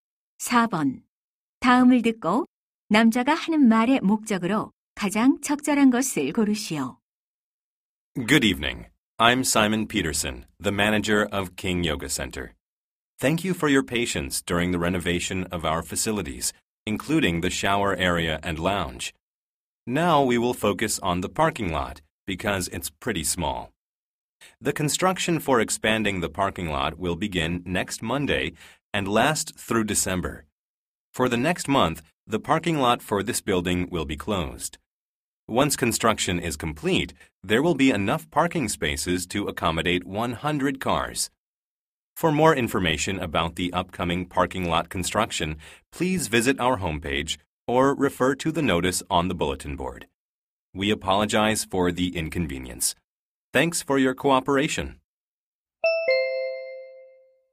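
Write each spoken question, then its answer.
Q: 다음을 듣고 남자가 하는 말의 목적으로 가장 적절한 것을 고르시오.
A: 주차장 확장 공사를 안내하려고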